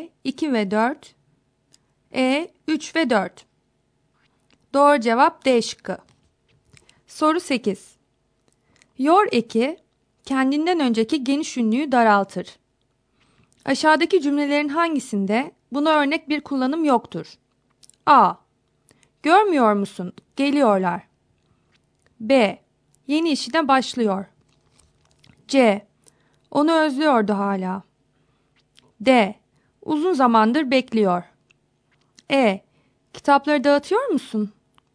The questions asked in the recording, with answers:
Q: Aşağıdaki cümlelerin hangisinde buna örnek bir kullanım yoktur?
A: Doğru cevap E şıkkı.